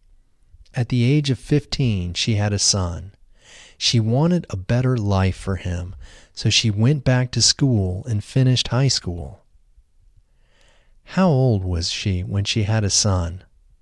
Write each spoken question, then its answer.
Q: How old was she when she had a son?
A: She was 15 when she had a son.